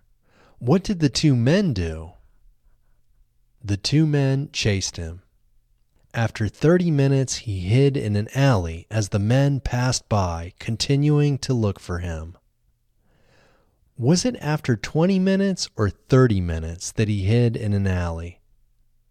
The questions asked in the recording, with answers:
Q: Was it after 20 minutes or 30 minutes that he hid in an alley?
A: It was after 30 minutes that he hid in an alley.